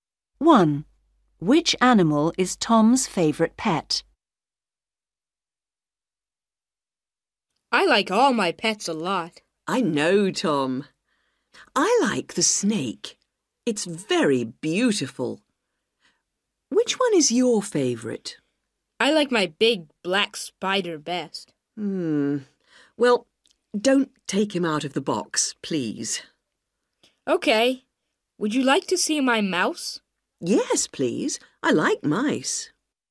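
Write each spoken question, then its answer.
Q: Which animal is Tom's favorite pet?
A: his big black spider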